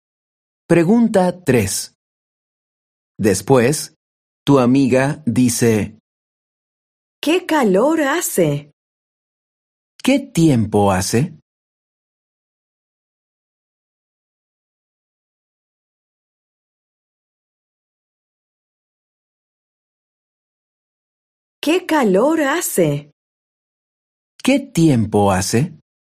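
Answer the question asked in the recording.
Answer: hace calor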